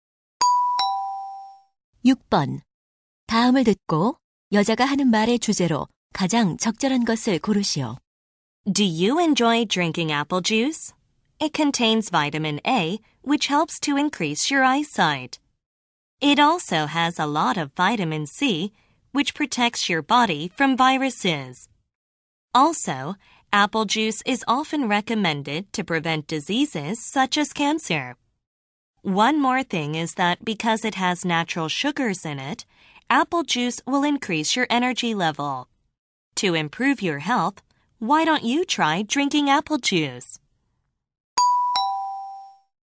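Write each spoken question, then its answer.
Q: 다음을 듣고 여자가 하는 말의 주제로 가장 적절한 것을 고르시오.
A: 사과 주스가 건강에 좋은 점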